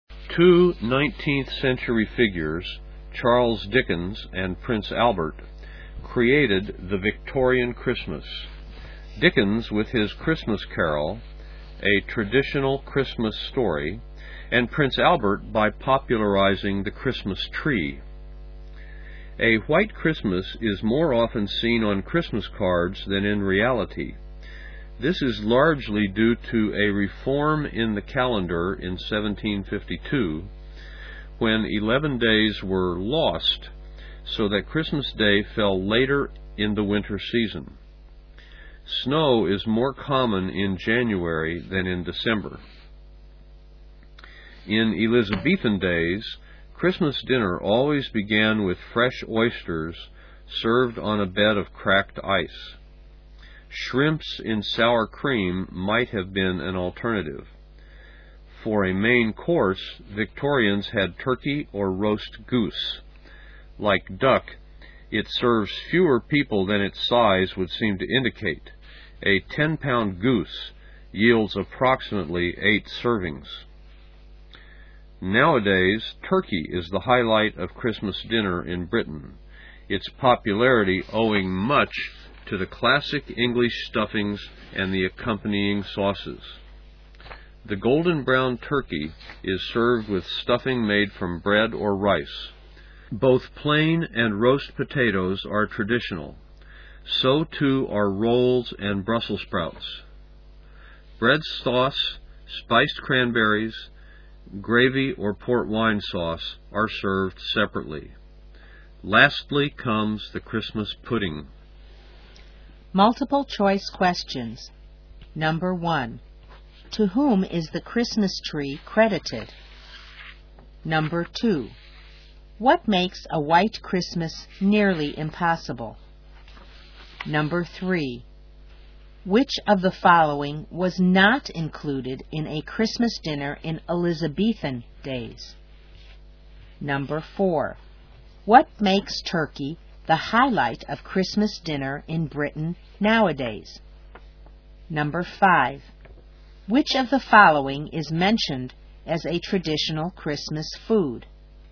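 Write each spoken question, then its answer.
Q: To whom is the Christmas tree credited?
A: Prince Albert

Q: What makes turkey the highlight of Christmas dinner in Britain nowadays?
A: The classic English stuffings and the accompanying sauces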